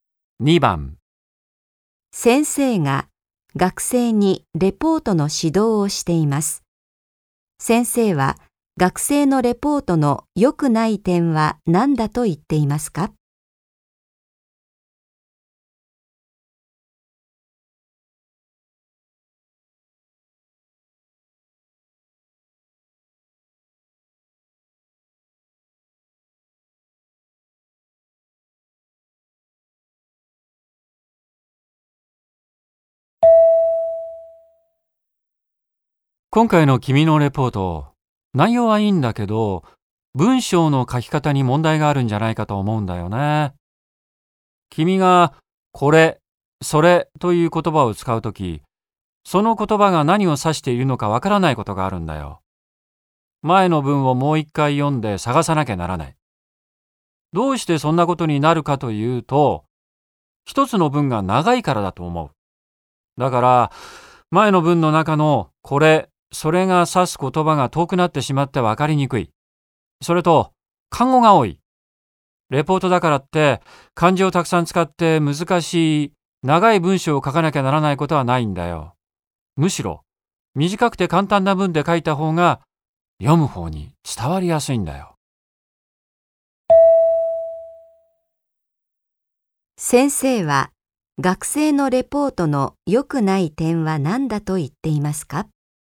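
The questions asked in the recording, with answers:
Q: 先生は、学生のレポートの良くない点は何だと言っていますか?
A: 一つの文が長いこと(そのため「これ」「それ」が何を指すか分かりにくく、漢語も多い)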